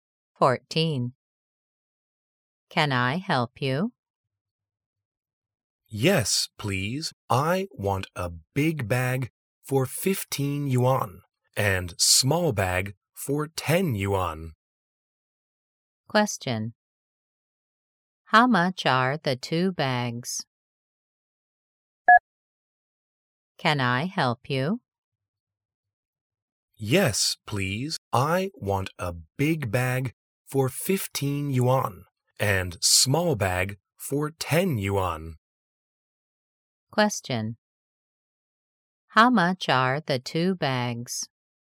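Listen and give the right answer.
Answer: 25 yuan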